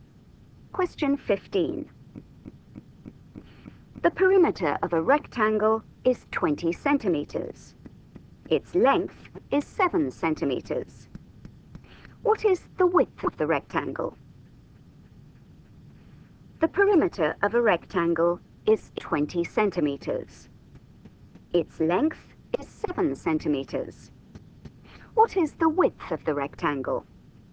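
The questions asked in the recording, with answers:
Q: What is the width of the rectangle?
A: 3 centimeters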